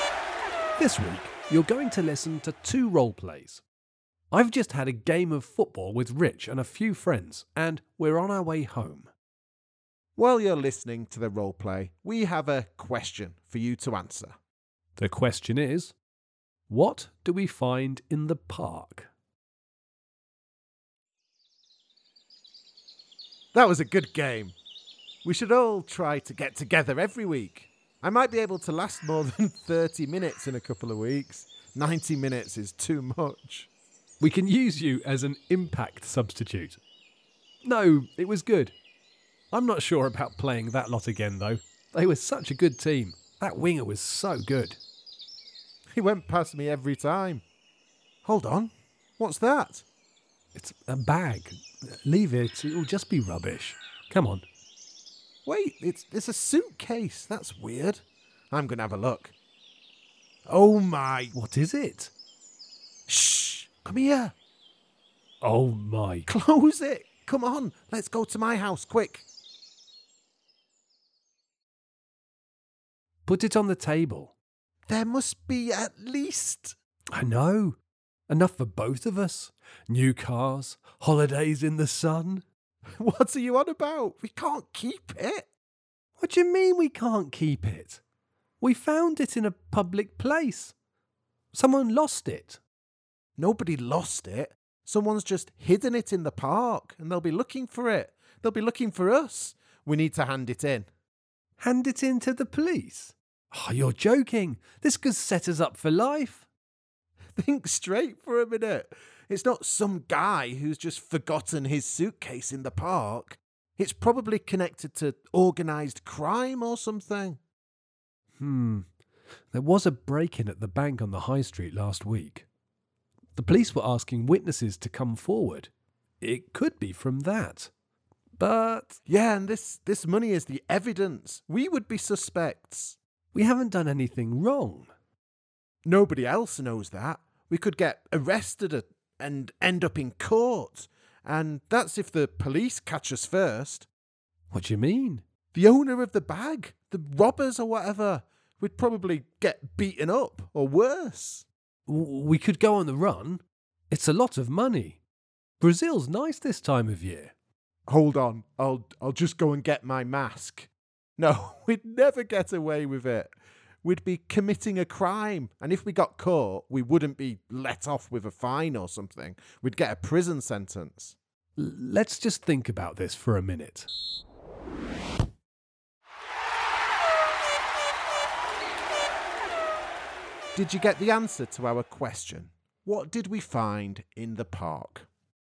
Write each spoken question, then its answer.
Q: What did we find in the park?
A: The answer is a lot of money.